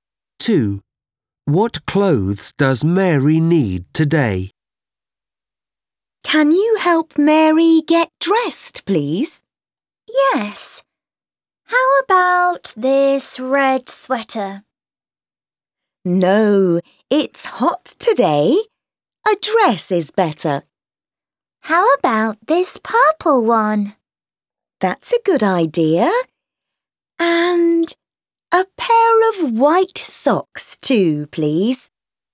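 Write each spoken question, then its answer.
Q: What clothes does Mary need today?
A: A purple dress and a pair of white socks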